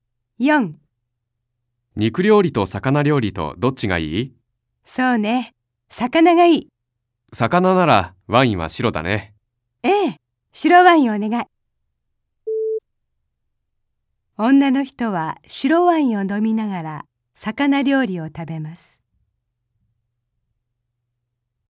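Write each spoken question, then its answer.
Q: 女の人は白ワインを飲みながら魚料理を食べます。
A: ○(正しい)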